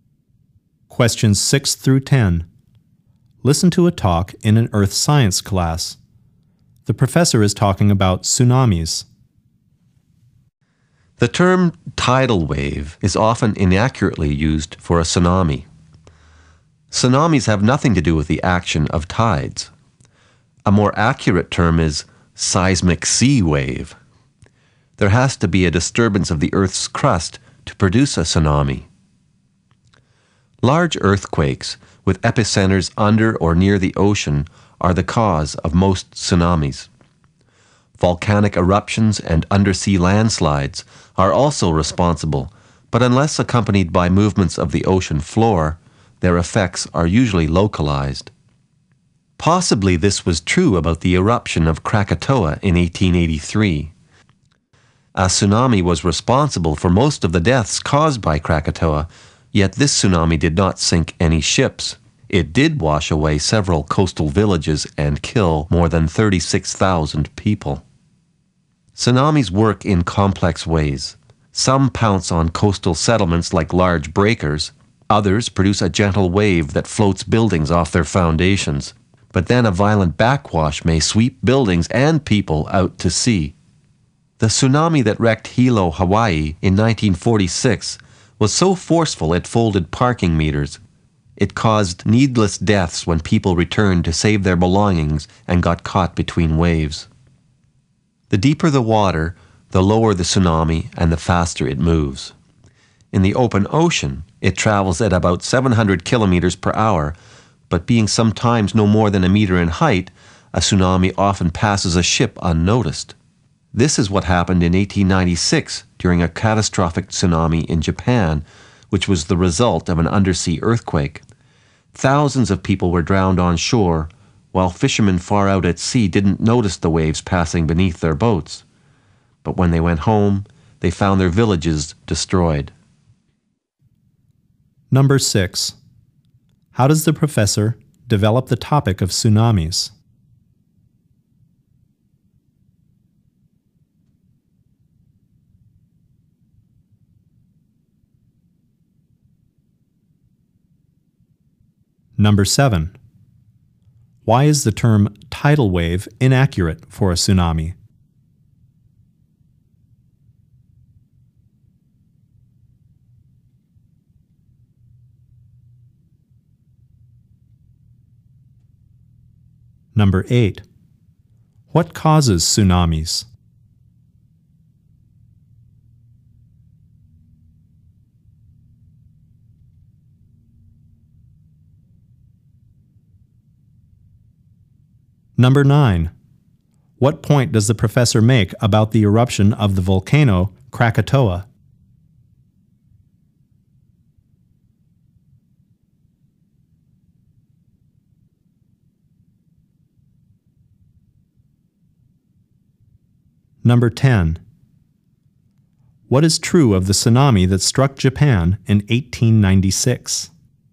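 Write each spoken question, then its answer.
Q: Why is the term tidal wave inaccurate for a tsunami?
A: Tsunamis have nothing to do with tides

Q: What causes tsunamis?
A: Disturbances of the Earth's crust, mostly undersea earthquakes

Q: What point does the professor make about the eruption of the volcano Krakatoa?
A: Its tsunami caused most of the deaths but sank no ships

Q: What is true of the tsunami that struck Japan in 1896?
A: Fishermen at sea did not notice it, but it destroyed villages on shore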